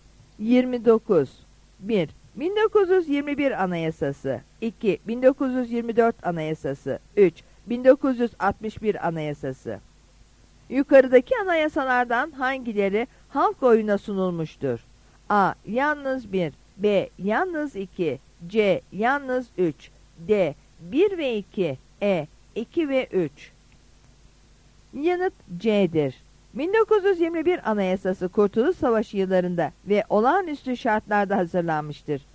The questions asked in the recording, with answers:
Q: Yukarıdaki anayasalardan hangileri halk oyuna sunulmuştur?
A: Yanıt C'dir.